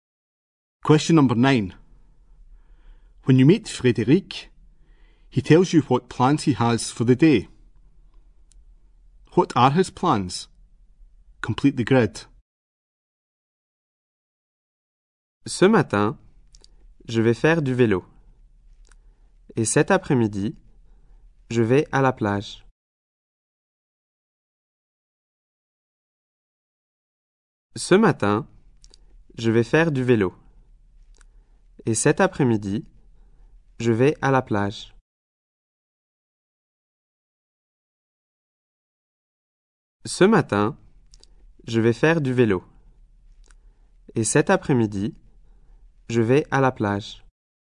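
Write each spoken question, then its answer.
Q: What are his plans?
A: Cycling this morning, the beach this afternoon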